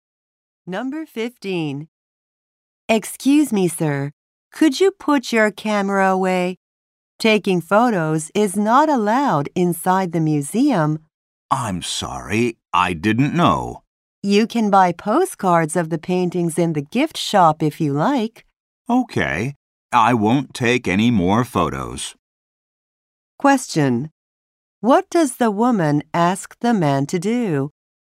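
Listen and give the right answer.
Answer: Put his camera away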